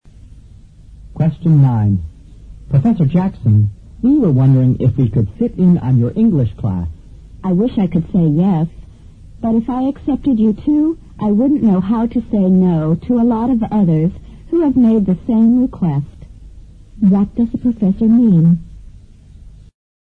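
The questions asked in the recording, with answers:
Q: What does the professor mean?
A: He can't let them sit in on his class, or he would have to say yes to many others too.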